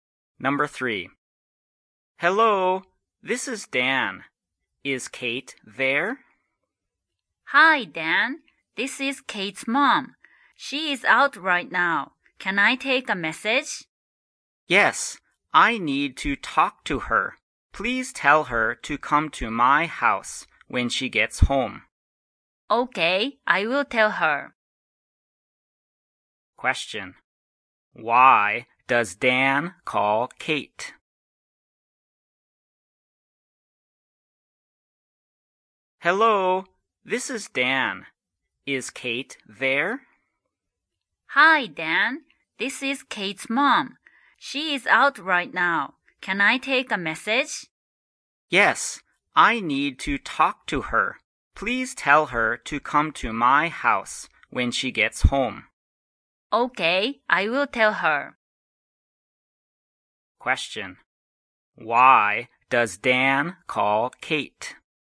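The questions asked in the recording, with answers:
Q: Why does Dan call Kate?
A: He wants her to come to his house (he needs to talk to her).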